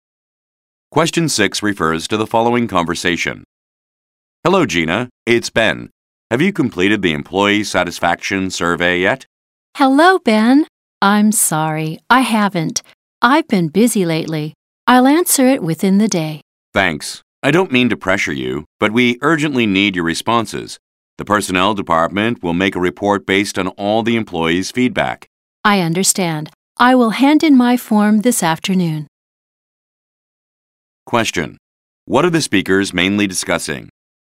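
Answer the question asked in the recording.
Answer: An employee satisfaction survey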